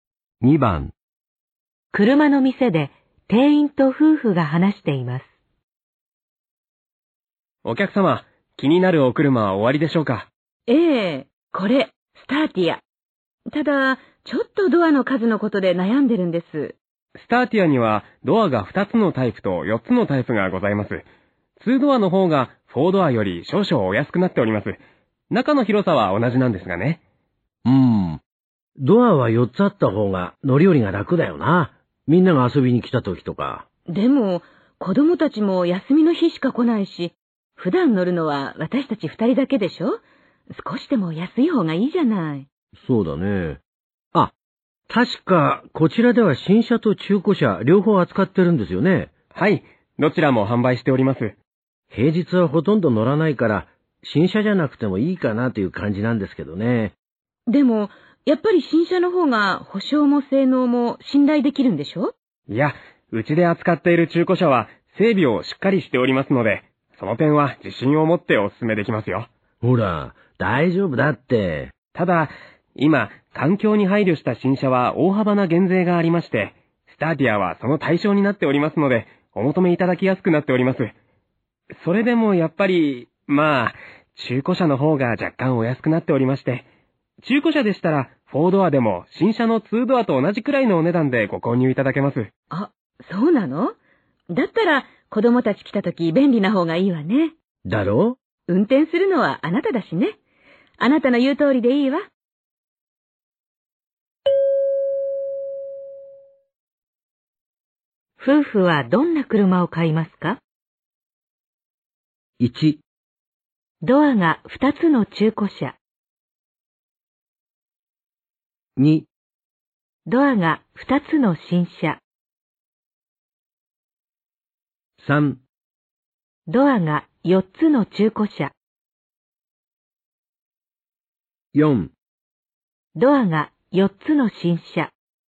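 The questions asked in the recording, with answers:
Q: 夫婦はどんな車を買いますか?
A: 3: ドアが4つの中古車。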